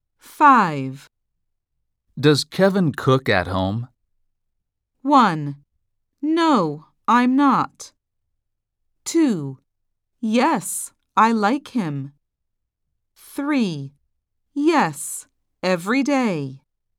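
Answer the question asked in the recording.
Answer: 3: Yes, every day.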